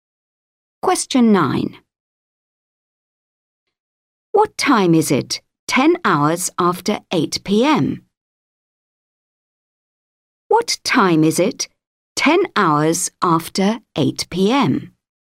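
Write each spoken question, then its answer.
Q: What time is it 10 hours after 8 PM?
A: 6 AM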